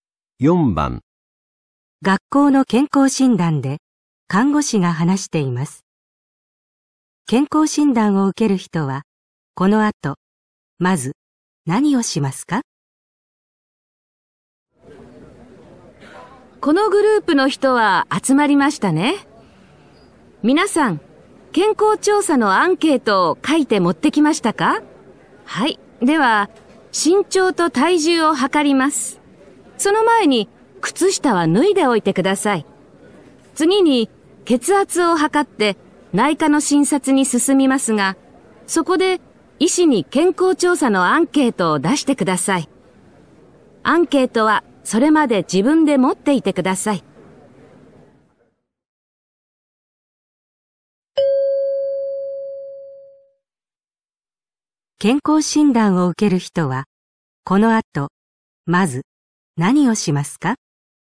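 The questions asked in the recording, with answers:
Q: 健康診断を受ける人はこの後まず何をしますか?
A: 靴下を脱ぐ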